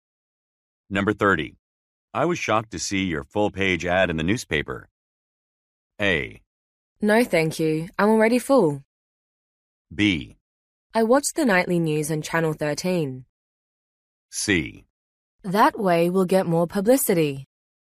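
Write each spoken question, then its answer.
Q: I was shocked to see your full-page ad in the newspaper.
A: C: That way we'll get more publicity.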